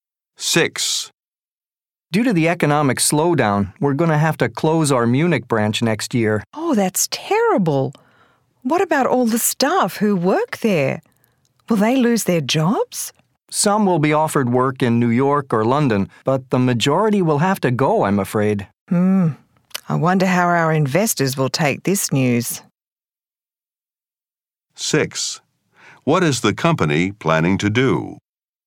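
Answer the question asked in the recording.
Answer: Close its Munich branch next year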